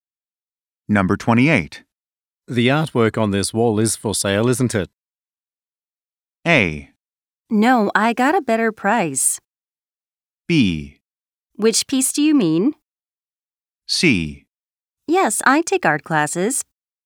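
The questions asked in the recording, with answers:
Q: The artwork on this wall is for sale, isn't it?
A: B: Which piece do you mean?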